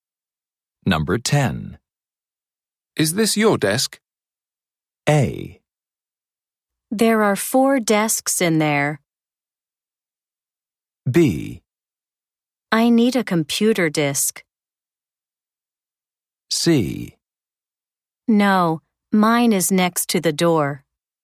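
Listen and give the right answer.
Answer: C: No, mine is next to the door.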